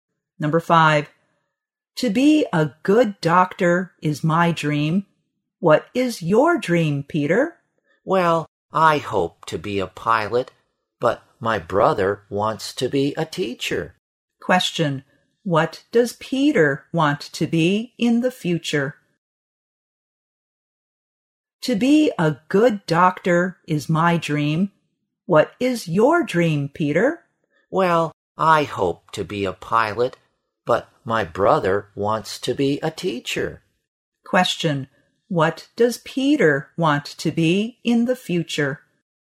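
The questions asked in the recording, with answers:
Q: What does Peter want to be in the future?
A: A pilot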